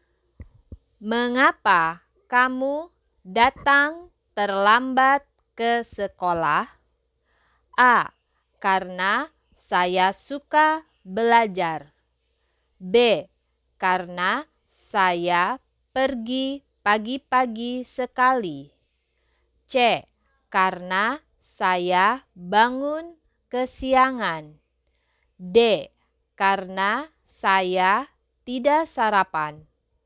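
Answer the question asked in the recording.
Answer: C: Karena saya bangun kesiangan.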